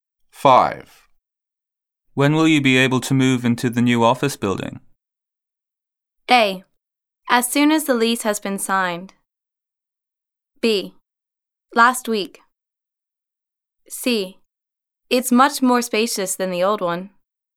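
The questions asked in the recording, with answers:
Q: When will you be able to move into the new office building?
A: A: As soon as the lease has been signed.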